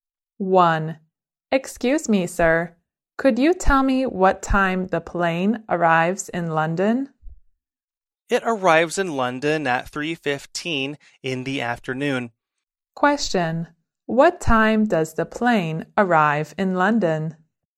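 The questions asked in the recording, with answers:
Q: What time does the plane arrive in London?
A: At 3:15 in the afternoon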